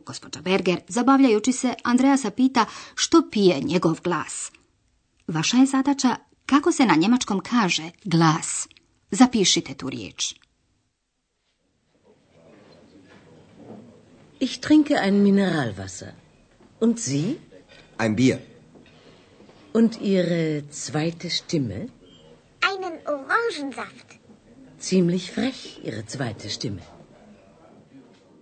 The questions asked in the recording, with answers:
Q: Kako se na njemačkom kaže glas?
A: njemački izraz za glas, štime.